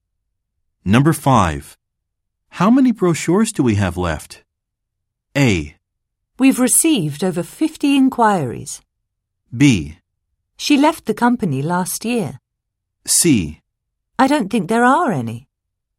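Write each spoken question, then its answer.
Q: How many brochures do we have left?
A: C: I don't think there are any.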